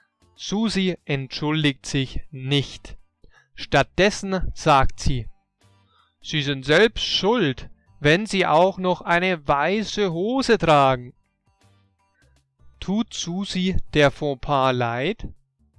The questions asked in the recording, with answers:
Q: Tut Susi der Fauxpas leid?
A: Nein, ihr tut der Fauxpas offensichtlich nicht leid.